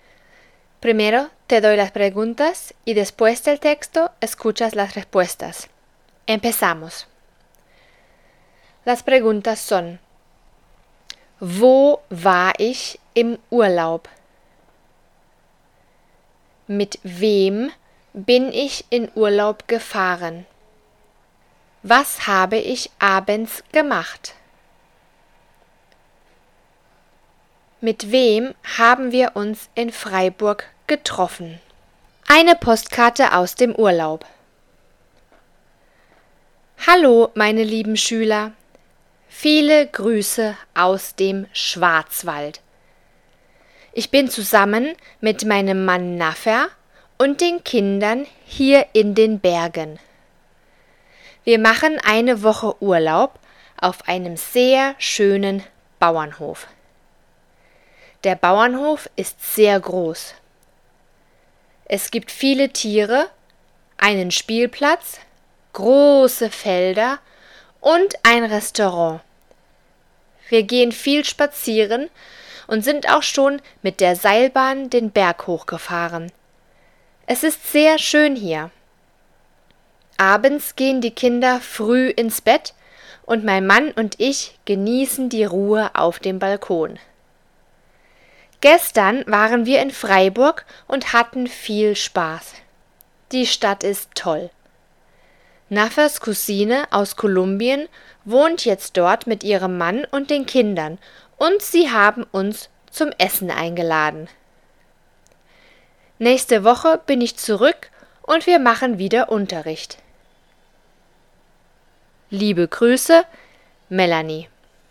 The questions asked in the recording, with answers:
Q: Wo war ich im Urlaub?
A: Im Schwarzwald.

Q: Mit wem bin ich in Urlaub gefahren?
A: Mit meiner Familie, meinem Mann Naffer und den Kindern.

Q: Was habe ich abends gemacht?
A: Ich habe mit meinem Mann die Ruhe auf dem Balkon genossen.

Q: Mit wem haben wir uns in Freiburg getroffen?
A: Mit Naffers Cousine und ihrer Familie.